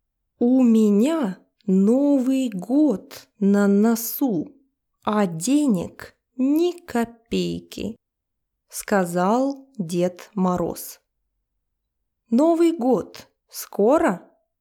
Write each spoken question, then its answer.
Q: Новый год скоро?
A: Да, Новый год очень скоро.